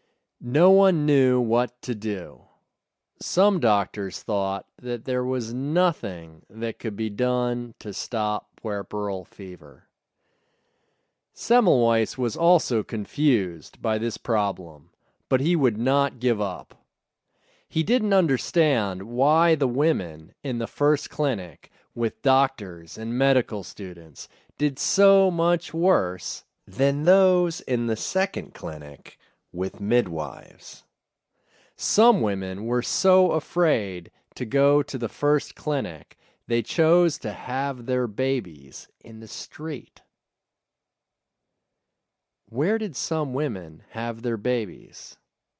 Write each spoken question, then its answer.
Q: Where did some women have their babies?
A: Some women had their babies in the street.